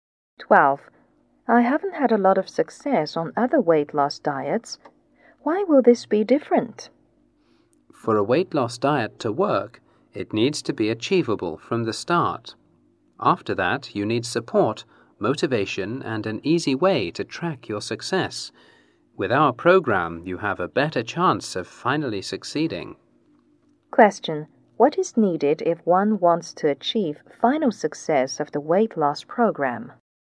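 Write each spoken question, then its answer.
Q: What is needed if one wants to achieve final success of the weight loss program?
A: An achievable start, plus support, motivation and an easy way to track success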